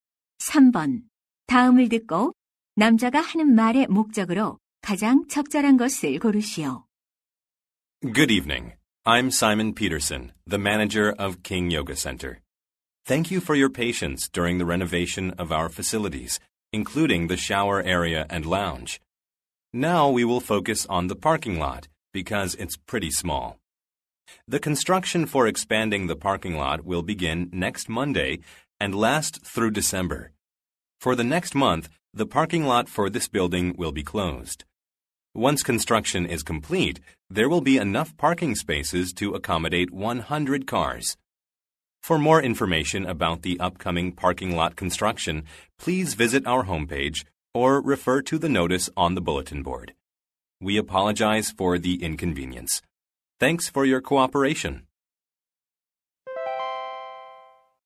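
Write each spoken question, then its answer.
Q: 다음을 듣고 남자가 하는 말의 목적으로 가장 적절한 것을 고르시오.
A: 주차장 확장 공사 일정과 폐쇄를 안내하려고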